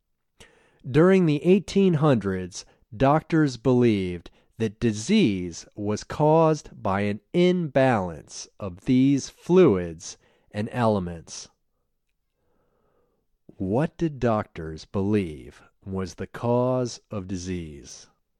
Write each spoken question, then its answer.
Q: What did doctors believe was the cause of disease?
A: Doctors believed that the cause of disease was an imbalance of these fluids and elements.